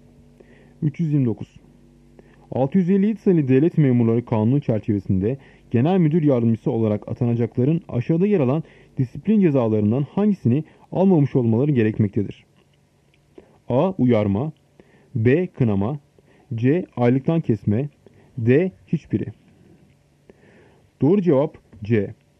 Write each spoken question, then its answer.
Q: 657 sayılı devlet memurları kanunu çerçevesinde genel müdür yardımcısı olarak atanacakların aşağıda yer alan disiplin cezalarından hangisini almamış olmaları gerekmektedir?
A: Doğru cevap C. Aylıktan kesme.